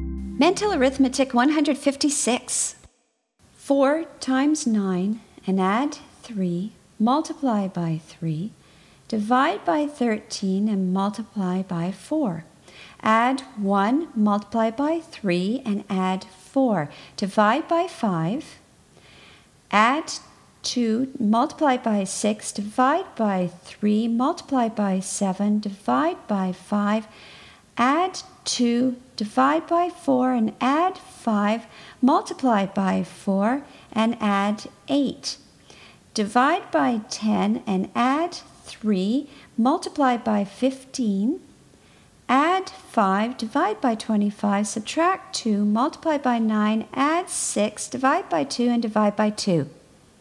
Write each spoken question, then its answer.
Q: 4 times 9 and add 3, multiply by 3, divide by 13 and multiply by 4. Add 1, multiply by 3 and add 4. Divide by 5. Add 2, multiply by 6, divide by 3, multiply by 7, divide by 5. Add 2, divide by 4 and add 5, multiply by 4 and add 8. Divide by 10 and add 3, multiply by 15. Add 5, divide by 25, subtract 2, multiply by 9, add 6, divide by 2 and divide by 2.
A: And the answer is 15.